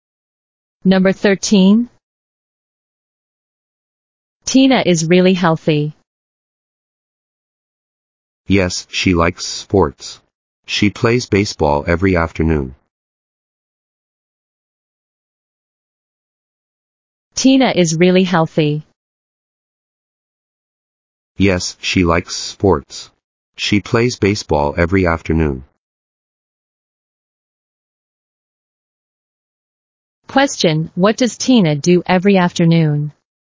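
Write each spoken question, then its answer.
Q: what does Tina do every afternoon?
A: She plays baseball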